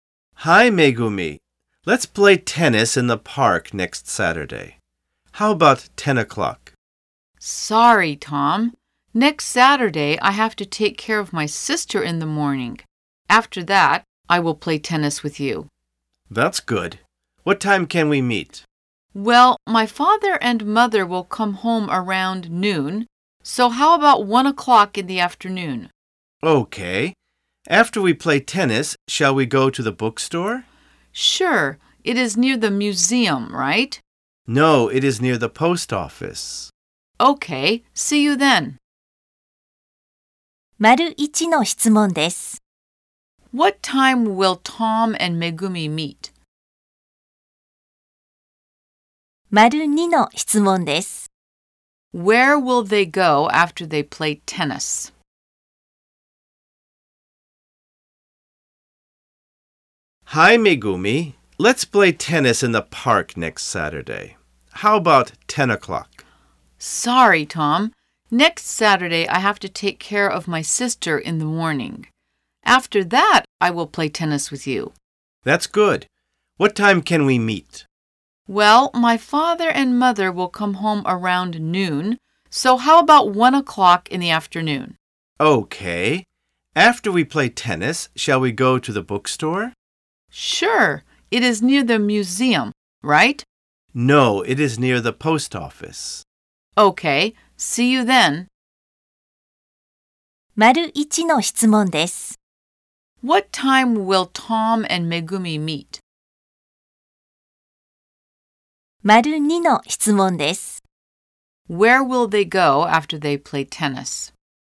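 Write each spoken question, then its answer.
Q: What time will Tom and Megumi meet?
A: At 1 o'clock in the afternoon

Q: Where will they go after they play tennis?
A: To the bookstore near the post office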